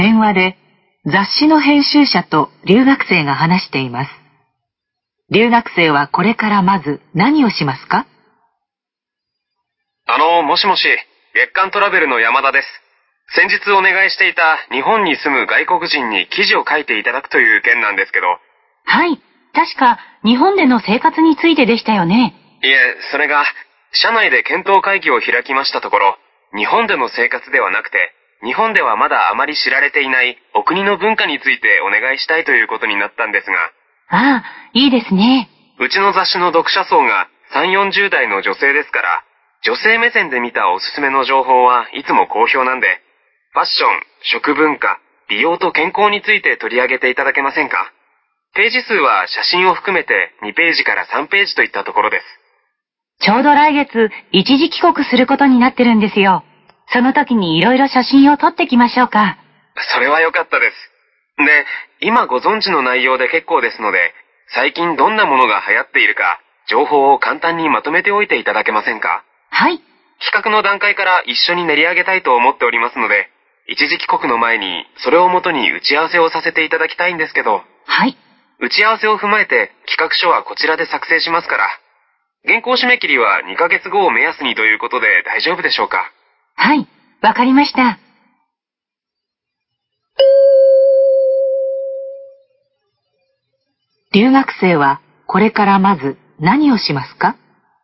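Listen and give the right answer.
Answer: 国で最近流行っているものの情報を簡単にまとめる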